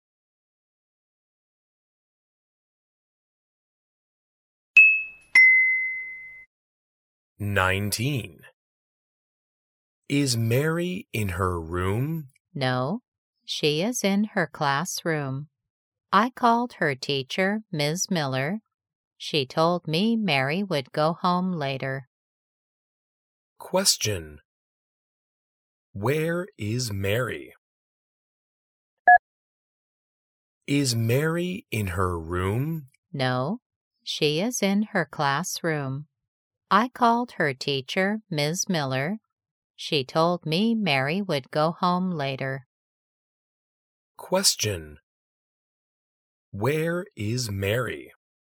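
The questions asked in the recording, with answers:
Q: Where is Mary?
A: In her classroom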